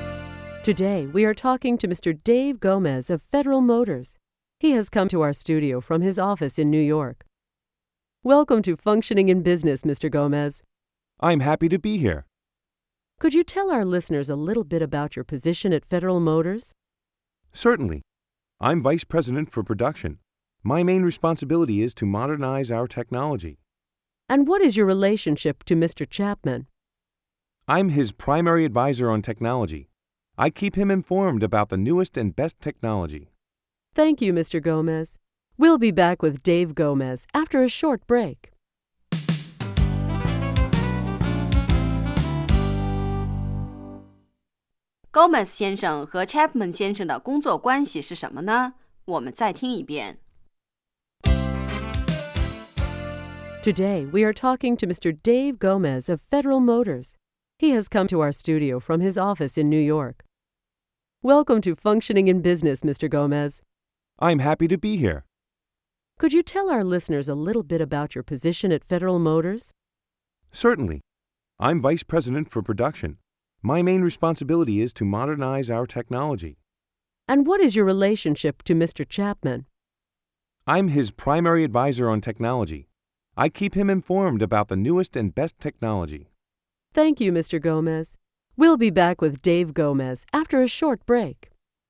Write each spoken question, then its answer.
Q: Gomez 先生和 Chapman 先生的工作关系是什么呢?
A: I'm his primary advisor on technology.